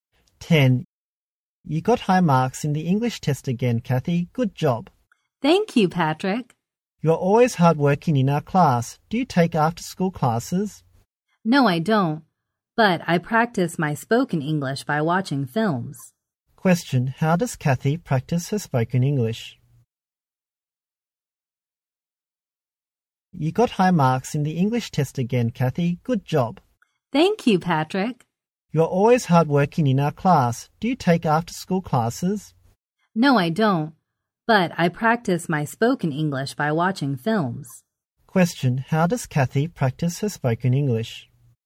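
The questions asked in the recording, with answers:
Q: how does Kathy practice her spoken English?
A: By watching films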